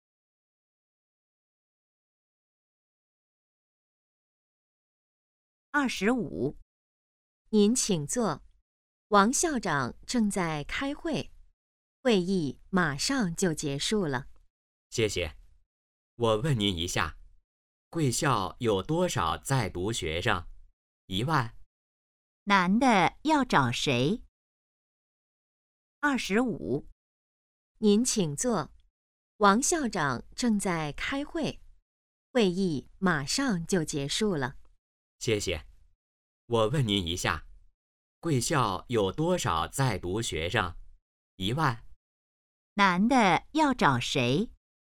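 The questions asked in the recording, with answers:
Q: 男的要找谁?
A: 王校长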